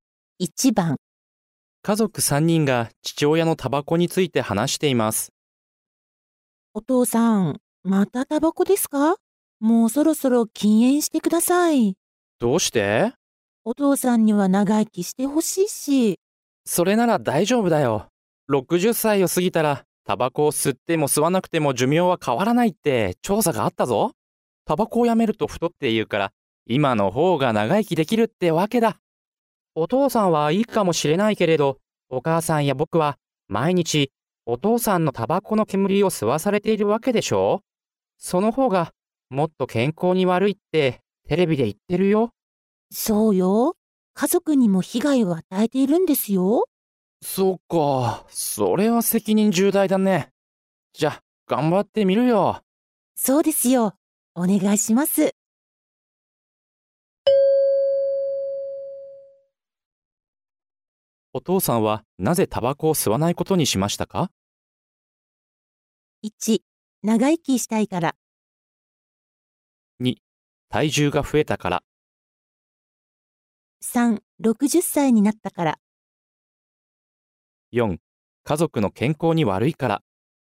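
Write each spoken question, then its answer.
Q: お父さんはなぜタバコを吸わないことにしましたか?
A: 4: 家族の健康に悪いから。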